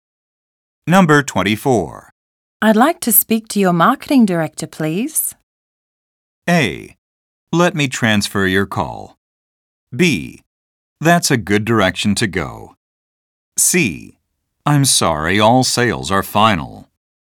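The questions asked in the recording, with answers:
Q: I'd like to speak to your marketing director, please.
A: A: Let me transfer your call.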